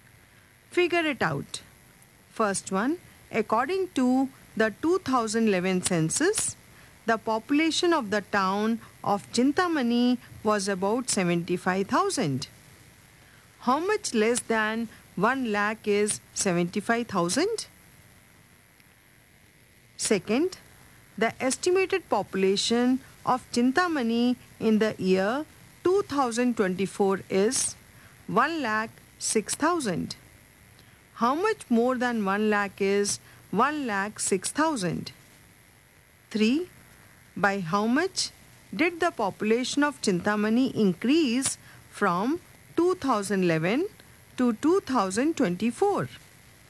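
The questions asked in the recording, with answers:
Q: How much less than 1 lakh is 75,000?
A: 25,000

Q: How much more than 1 lakh is 1,06,000?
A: 6,000

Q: By how much did the population of Chintamani increase from 2011 to 2024?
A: 31,000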